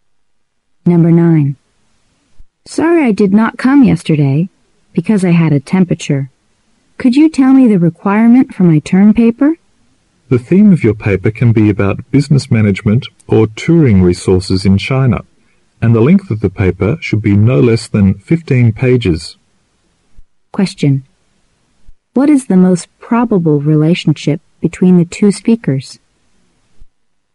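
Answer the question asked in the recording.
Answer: Student and teacher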